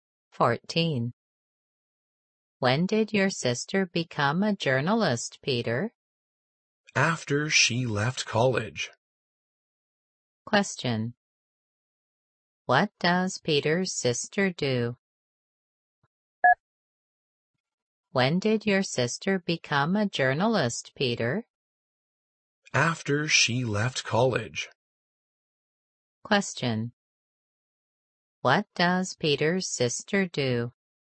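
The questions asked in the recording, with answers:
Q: What does Peter's sister do?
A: She is a journalist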